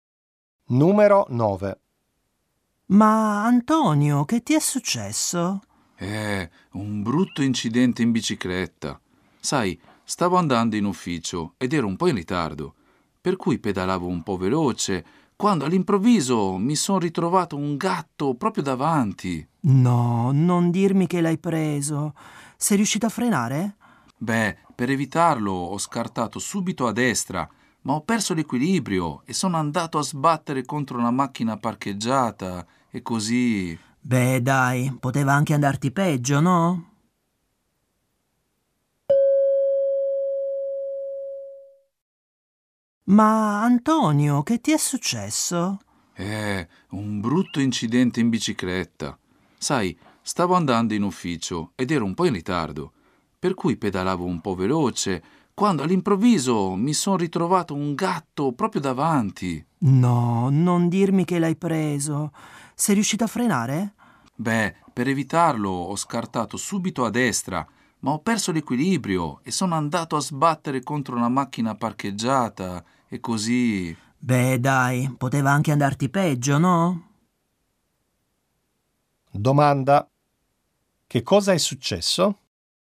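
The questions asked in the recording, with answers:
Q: Che cosa è successo?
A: Per evitare un gatto è caduto dalla bici contro una macchina parcheggiata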